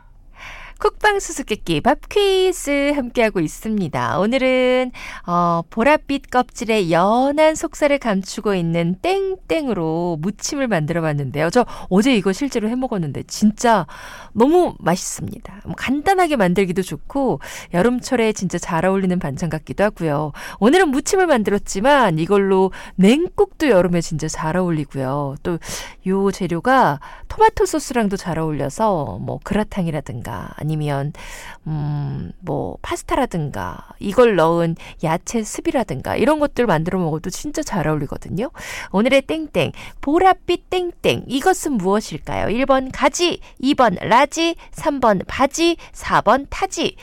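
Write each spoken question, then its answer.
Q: 오늘의 땡땡 보랏빛 땡땡 이것은 무엇일까요? 1번 가지, 2번 라지, 3번 바지, 4번 타지.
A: 1: 가지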